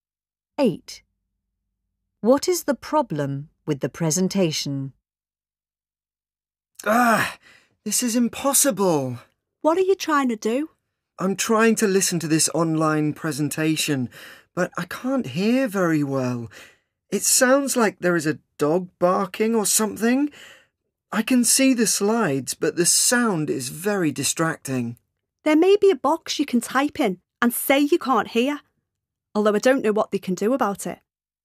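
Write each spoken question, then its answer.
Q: What is the problem with the presentation?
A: The sound is bad; a dog barking makes it hard to hear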